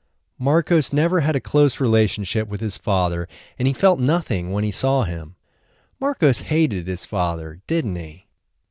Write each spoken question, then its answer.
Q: Marcos hated his father, didn't he?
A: No, he didn't hate his father.